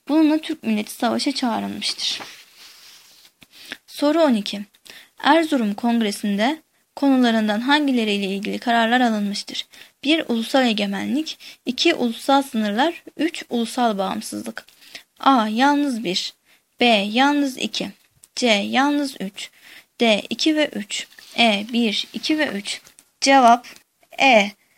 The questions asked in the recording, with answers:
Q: Erzurum Kongresi'nde konularından hangileriyle ilgili kararlar alınmıştır?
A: Cevap E.